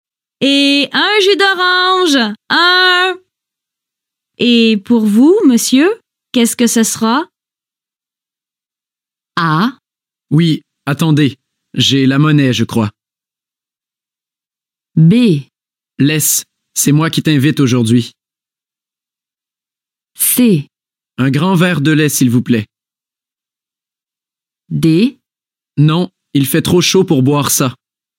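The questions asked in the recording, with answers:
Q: Et un jus d'orange, un. Et pour vous, monsieur, qu'est-ce que ce sera?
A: C: Un grand verre de lait, s'il vous plaît.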